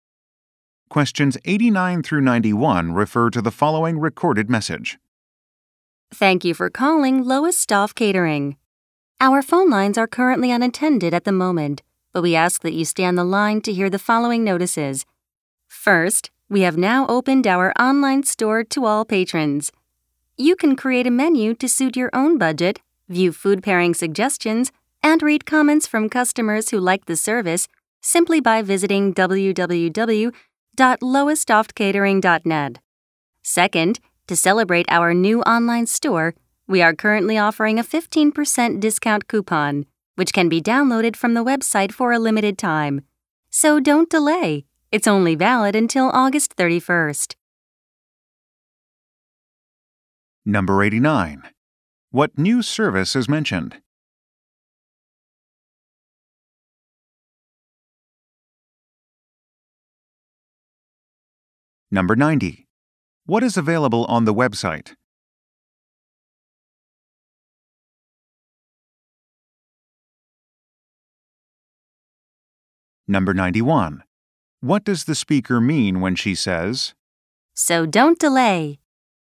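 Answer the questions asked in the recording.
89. An online store
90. A 15% discount coupon
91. The discount is only valid for a limited time, until August 31st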